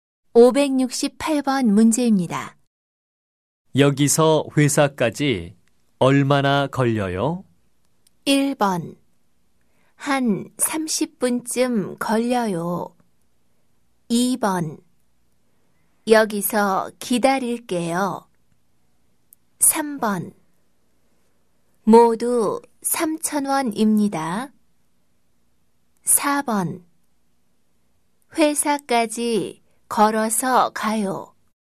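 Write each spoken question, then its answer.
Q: 여기서 회사까지 얼마나 걸려요?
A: 1: 한 30분쯤 걸려요.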